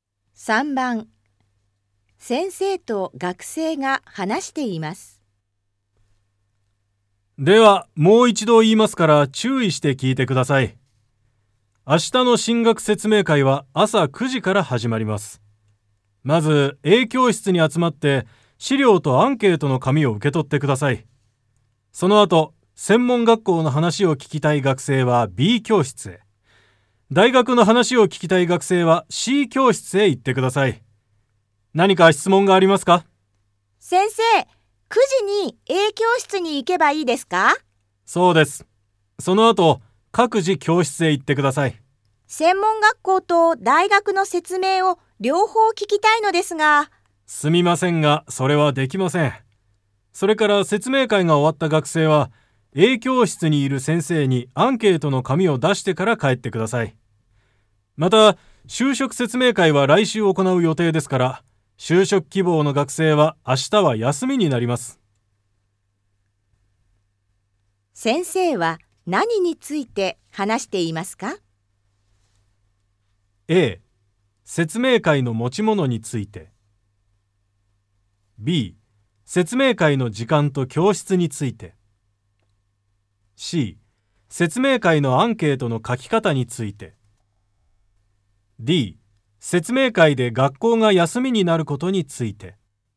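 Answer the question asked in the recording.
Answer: B: 説明会の時間と教室について。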